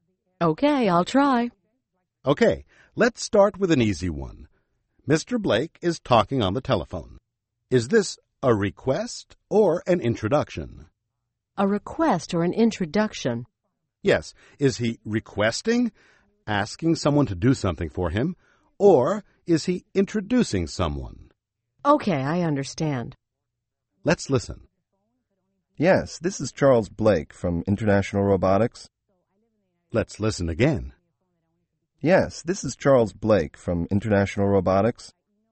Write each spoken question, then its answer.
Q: Is this a request or an introduction?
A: That's an introduction.